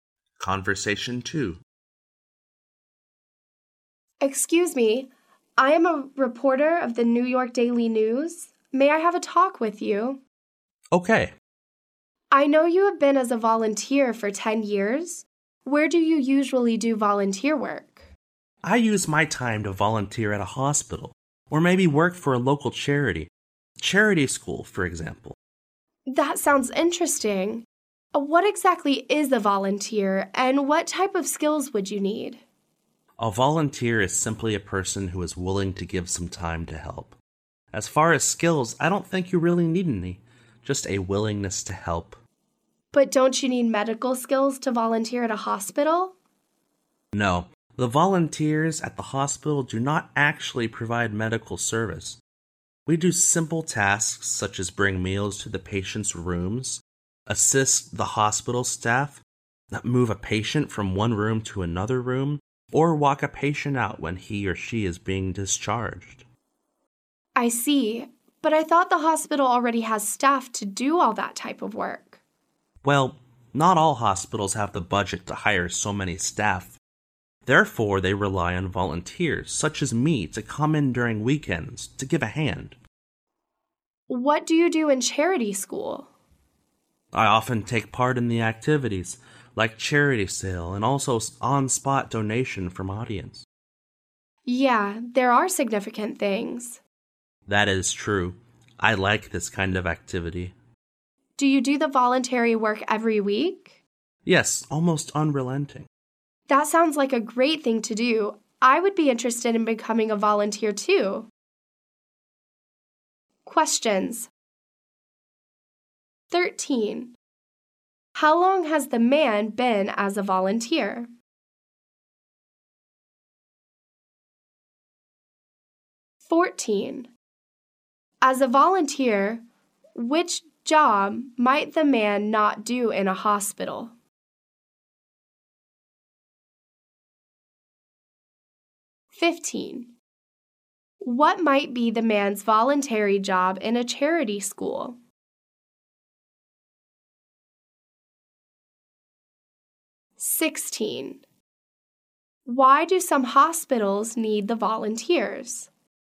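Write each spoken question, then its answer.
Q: How long has the man been as a volunteer?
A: 10 years

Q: As a volunteer, which job might the man not do in a hospital?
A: Provide medical service

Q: What might be the man's voluntary job in a charity school?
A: Taking part in activities like charity sales and on-spot donations

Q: Why do some hospitals need the volunteers?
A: They don't have the budget to hire enough staff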